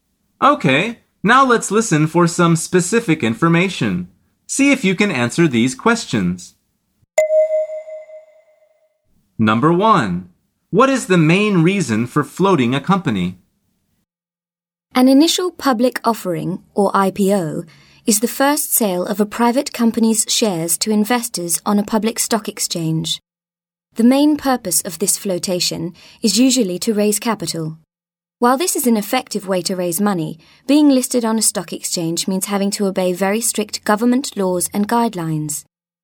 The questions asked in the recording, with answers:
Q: What is the main reason for floating a company?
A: The answer is to raise capital.